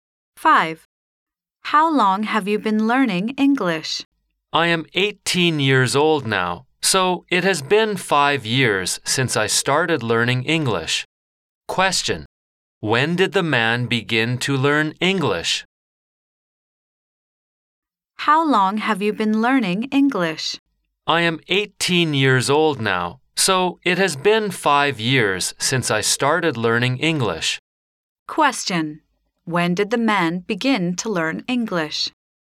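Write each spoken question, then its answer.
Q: when did the man begin to learn English?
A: At the age of 13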